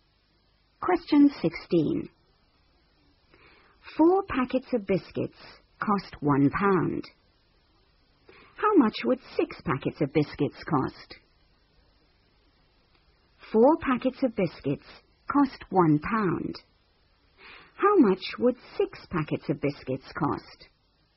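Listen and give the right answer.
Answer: £1.50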